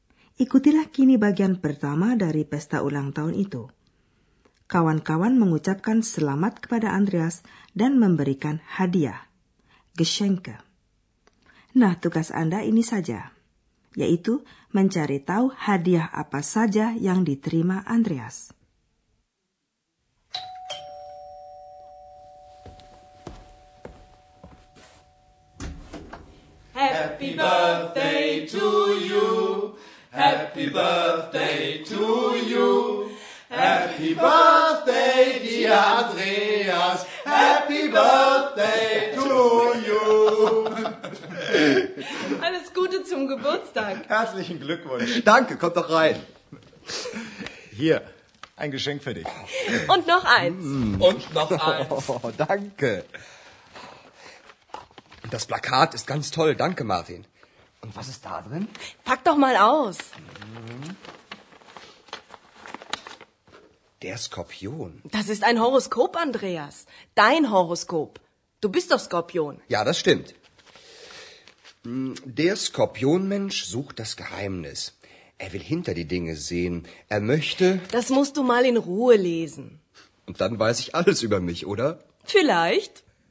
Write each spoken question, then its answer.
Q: Nah, tugas Anda ini saja, yaitu mencari tahu hadiah apa saja yang diterima Andreas.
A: Selembar poster dan sebuah horoskop yang dibuat untuknya oleh seorang tamu perempuan.